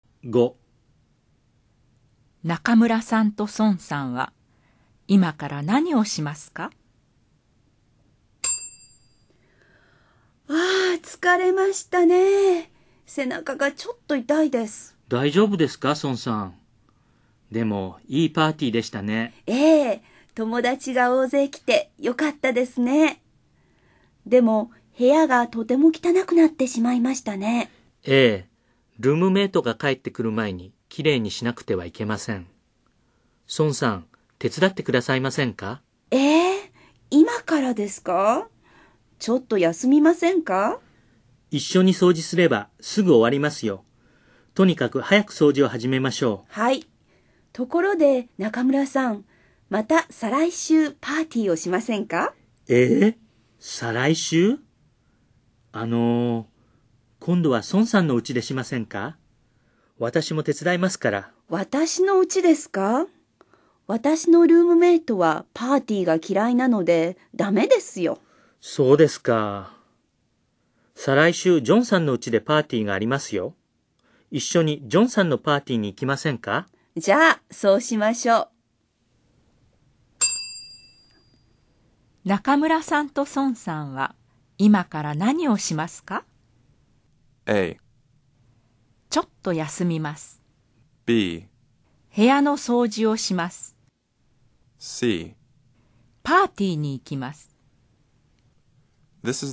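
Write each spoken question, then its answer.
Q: 中村さんと孫さんは今から何をしますか?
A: B: 部屋の掃除をします。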